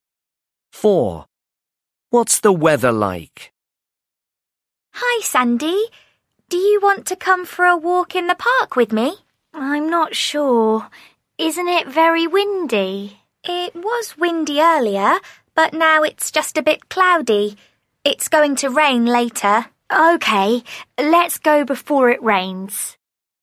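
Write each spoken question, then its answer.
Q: What's the weather like?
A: a bit cloudy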